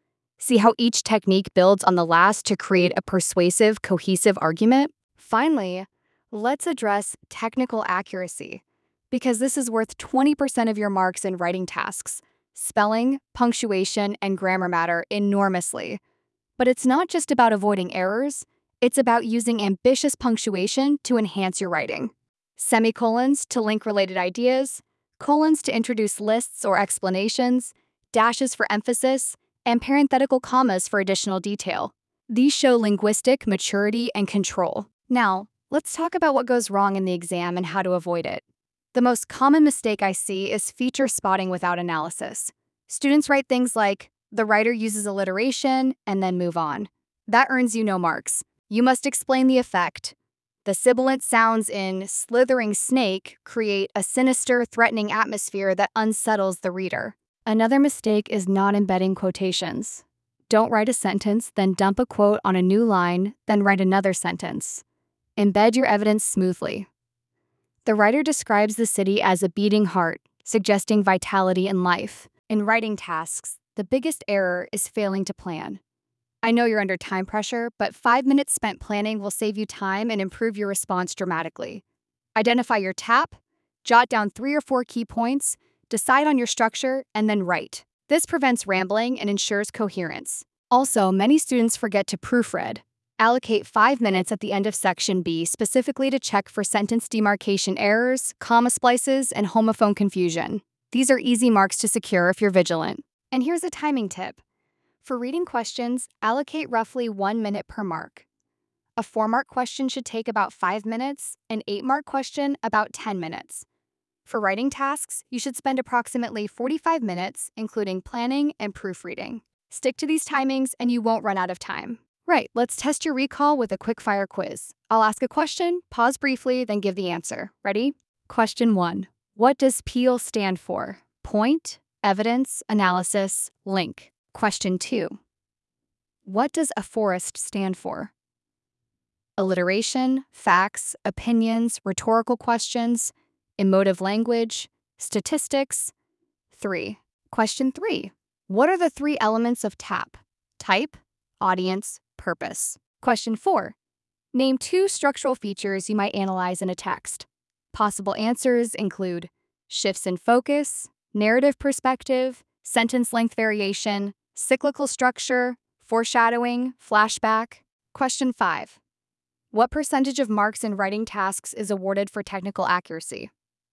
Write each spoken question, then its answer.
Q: What percentage of marks in writing tasks is awarded for technical accuracy?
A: 20%, which is AO6.